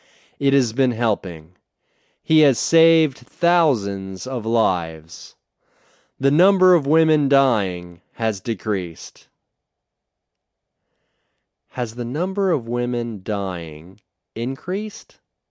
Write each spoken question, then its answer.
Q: Has the number of women dying increased?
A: No, the number of women dying hasn't increased.